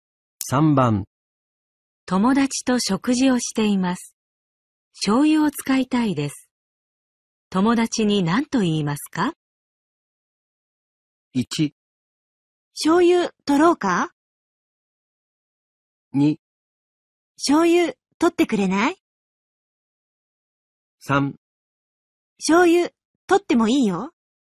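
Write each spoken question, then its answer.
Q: 友達と食事をしています。醤油を使いたいです。友達に何と言いますか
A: 2: 醤油取ってくれない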